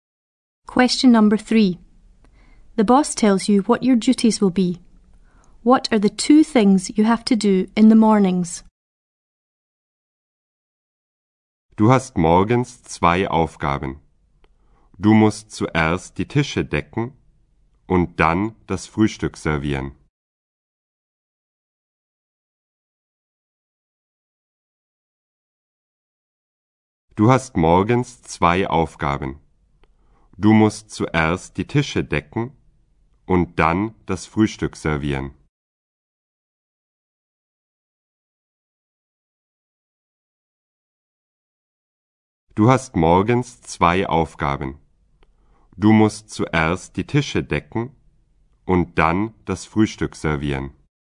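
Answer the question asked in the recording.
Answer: Set the tables and serve breakfast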